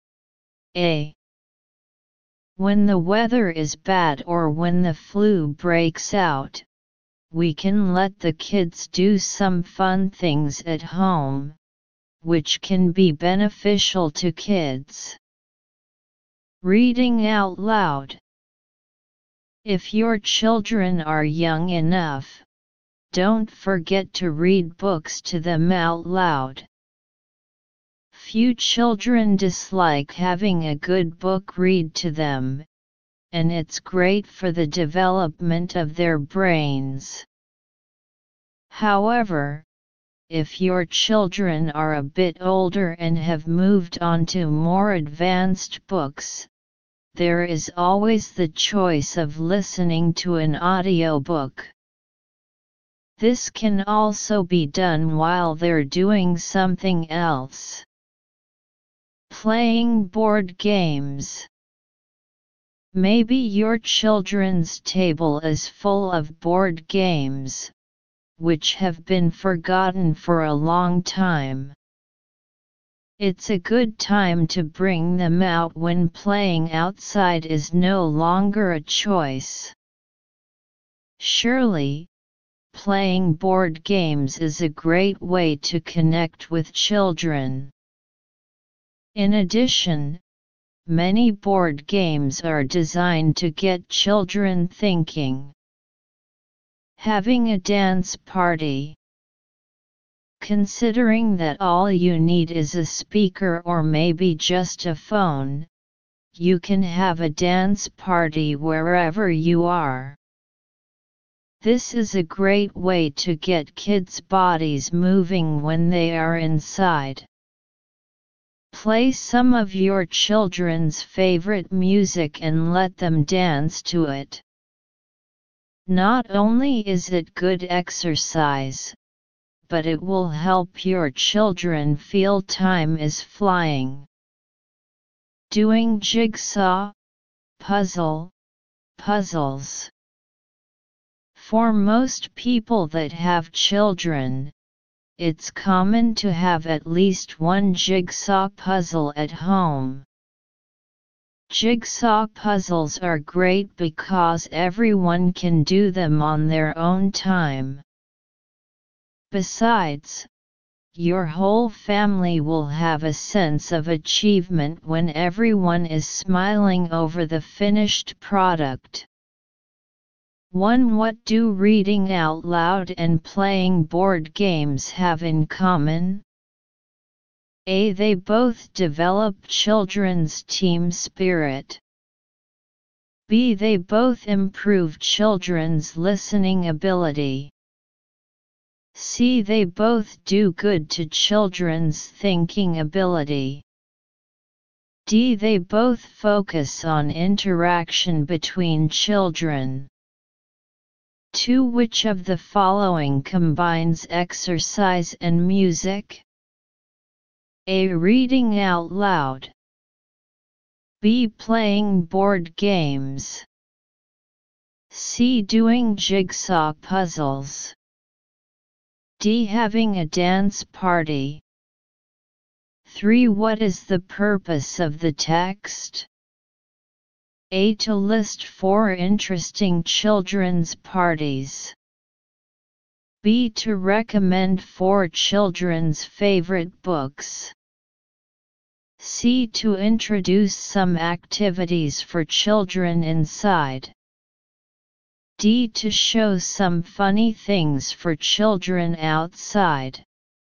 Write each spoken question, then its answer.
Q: What do reading out loud and playing board games have in common?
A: 1. C.

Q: Which of the following combines exercise and music?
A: 2. D.

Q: What is the purpose of the text?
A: 3. C.